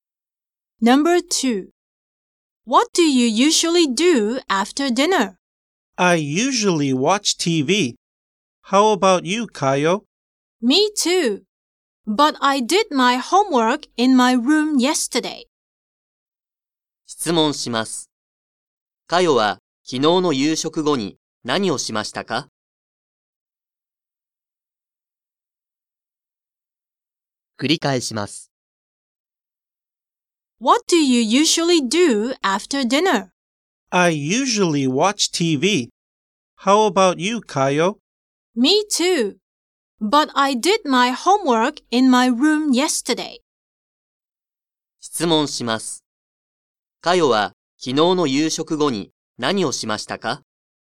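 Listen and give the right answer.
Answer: 自分の部屋で宿題をした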